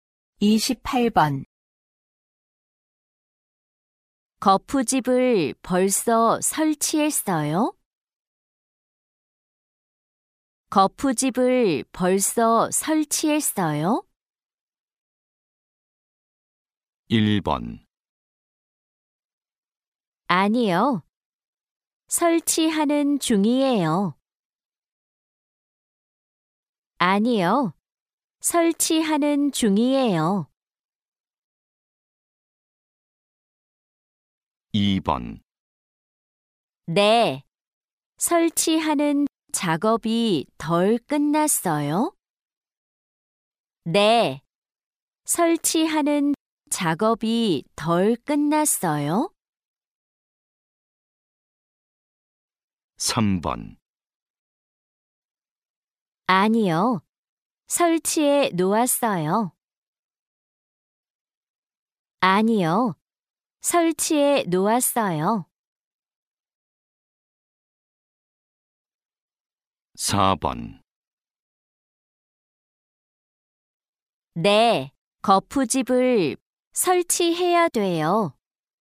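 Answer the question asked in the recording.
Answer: 1: 아니요. 설치하는 중이에요.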